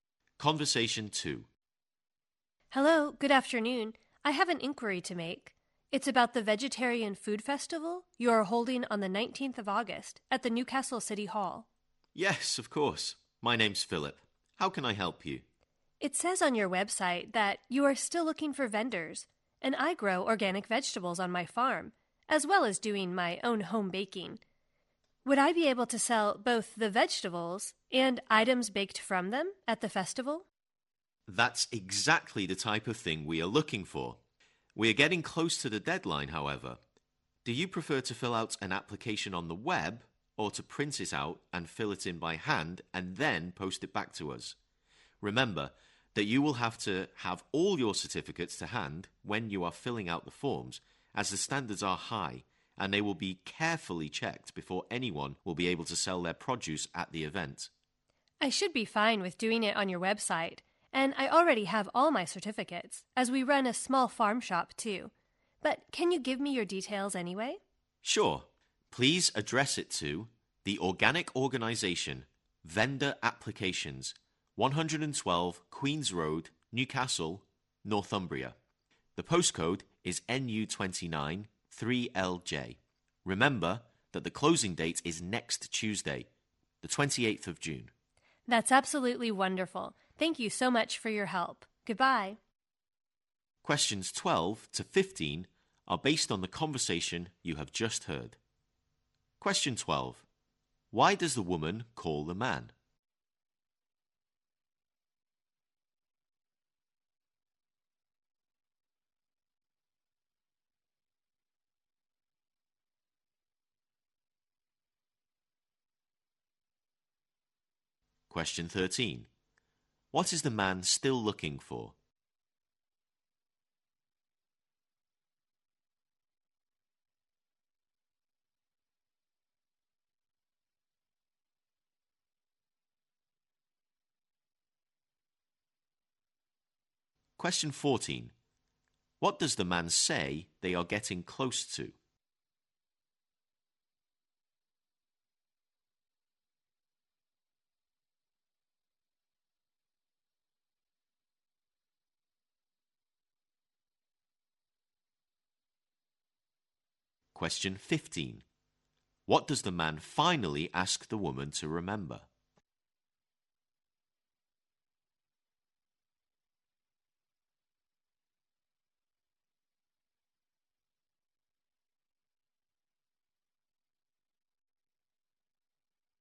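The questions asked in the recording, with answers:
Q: Why does the woman call the man?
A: To ask about selling her vegetables and baked goods at the Vegetarian Food Festival

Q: What is the man still looking for?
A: Vendors

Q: What does the man say they are getting close to?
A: The deadline

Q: What does the man finally ask the woman to remember?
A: The closing date is next Tuesday, the 28th of June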